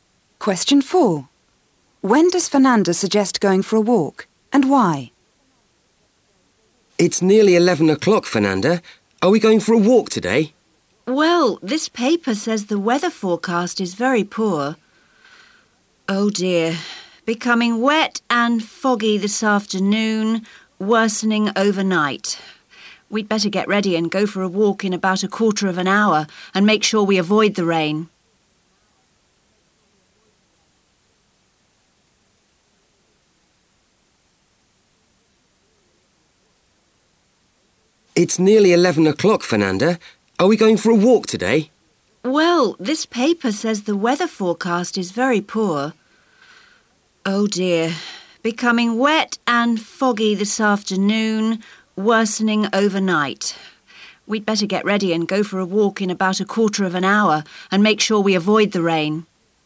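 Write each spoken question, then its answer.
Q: When does Fernanda suggest going for a walk and why?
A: In about a quarter of an hour, to avoid the rain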